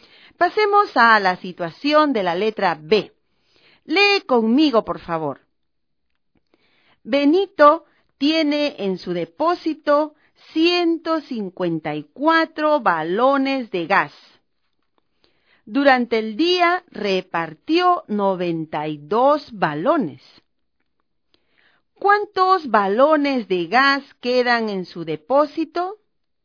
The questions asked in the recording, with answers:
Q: ¿Cuántos balones de gas quedan en su depósito?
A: Muy bien, 62.